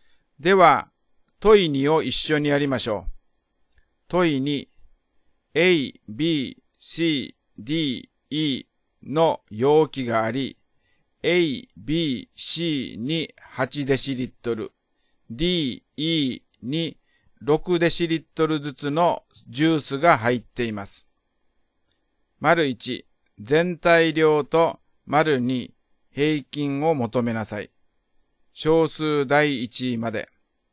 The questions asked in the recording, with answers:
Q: 丸1、全体量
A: 全体量が36デシリットルです。

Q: 丸2、平均を求めなさい。小数第1位まで。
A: 5つの容器の平均は 7.2 デシリットルになりましたね。